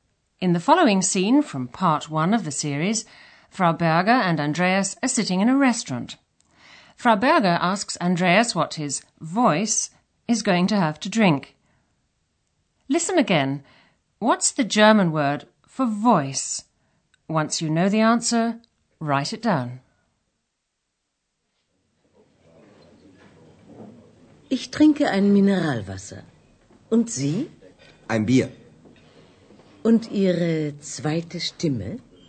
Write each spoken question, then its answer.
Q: What's the German word for voice?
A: The answer is Stimme.